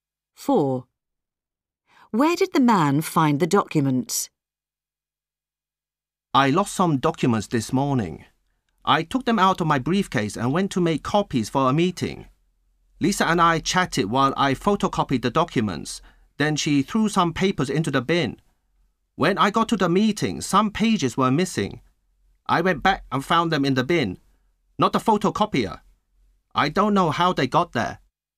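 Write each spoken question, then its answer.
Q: Where did the man find the documents?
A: in the bin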